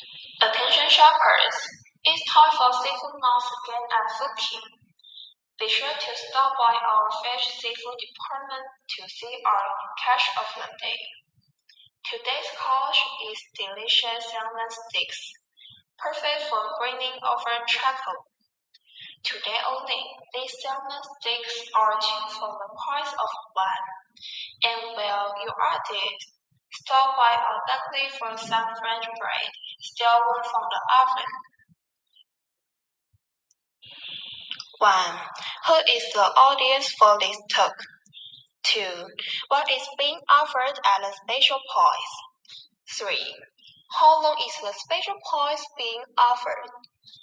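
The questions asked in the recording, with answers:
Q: who is the audience for this talk?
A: Shoppers at the store

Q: what is being offered at a special price?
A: Salmon steaks

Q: how long is the special price being offered?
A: Today only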